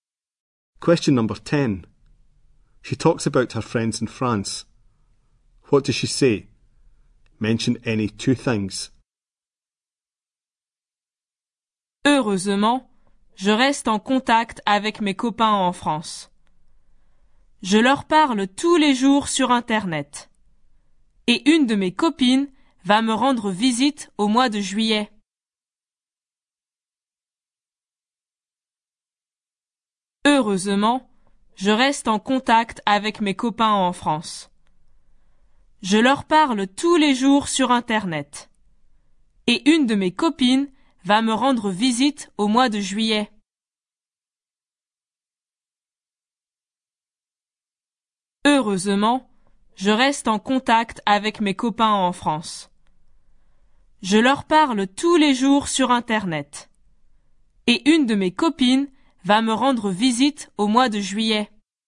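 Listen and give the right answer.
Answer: She keeps in touch, talks to them every day on the internet; a friend will visit in July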